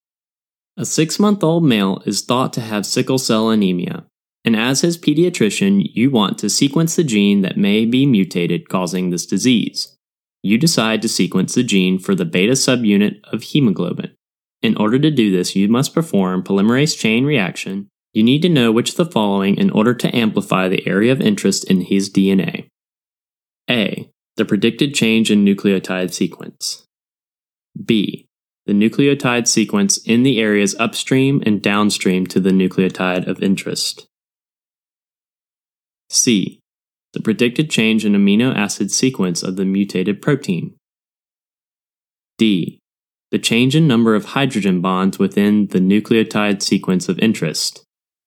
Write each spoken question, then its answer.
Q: You need to know which of the following in order to amplify the area of interest in his DNA.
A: The correct answer is B. The nucleotide sequence in the areas upstream and downstream to the nucleotides of interest.